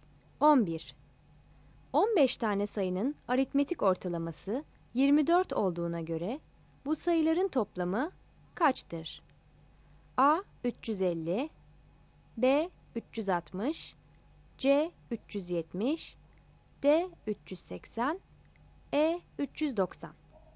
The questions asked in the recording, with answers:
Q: 15 tane sayının aritmetik ortalaması 24 olduğuna göre bu sayıların toplamı kaçtır?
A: Yanıt B'dir.